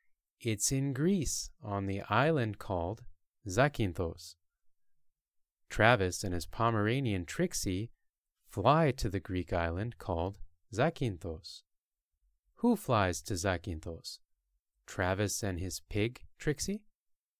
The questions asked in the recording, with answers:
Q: Who flies to Zakynthos? Travis and his pig, Trixie?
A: No, not Travis and his pig, Trixie.